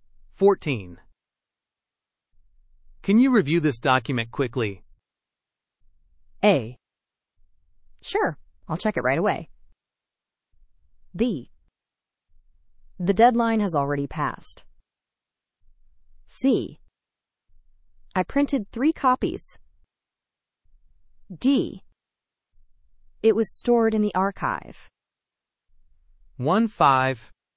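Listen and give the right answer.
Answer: A: Sure, I'll check it right away.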